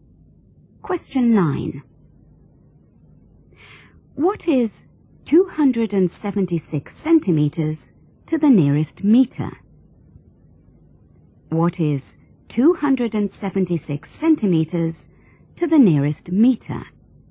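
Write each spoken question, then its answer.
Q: What is 276 centimeters to the nearest meter?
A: 3 meters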